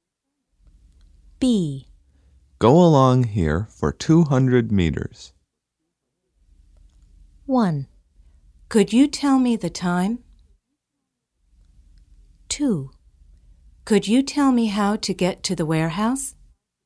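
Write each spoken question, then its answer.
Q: Go along here for 200 meters.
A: 2: Could you tell me how to get to the warehouse?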